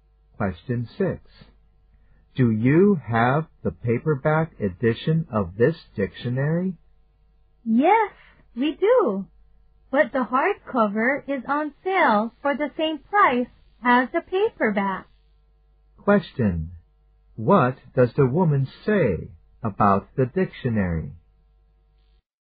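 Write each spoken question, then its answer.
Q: What does the woman say about the dictionary?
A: The hardcover is on sale for the same price as the paperback.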